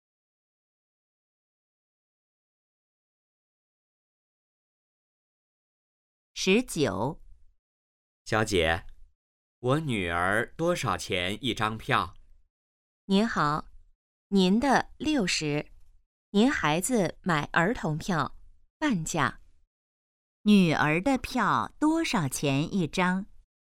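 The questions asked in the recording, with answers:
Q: 女儿的票多少钱一张?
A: 30元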